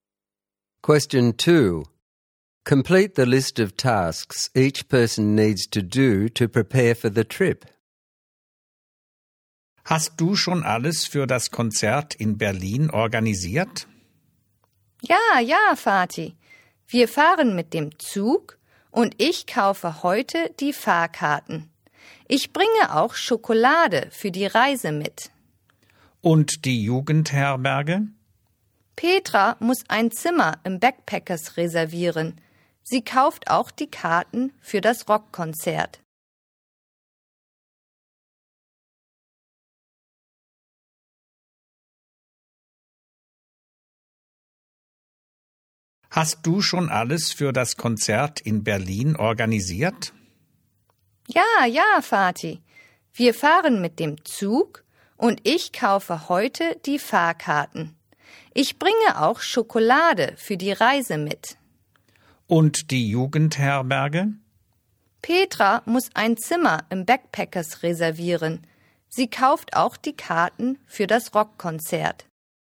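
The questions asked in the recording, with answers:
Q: Complete the list of tasks each person needs to do to prepare for the trip.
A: Speaker: buy train tickets, bring chocolate; Petra: reserve a room at the backpackers, buy the rock concert tickets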